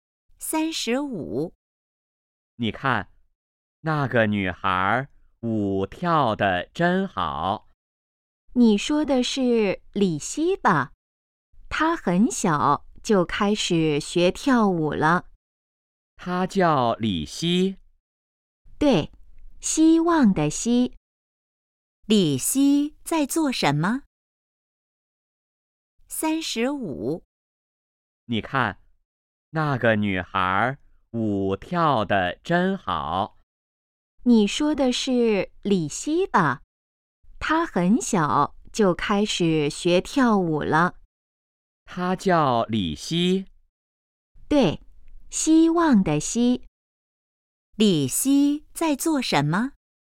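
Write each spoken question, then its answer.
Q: 李希在做什么?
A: 跳舞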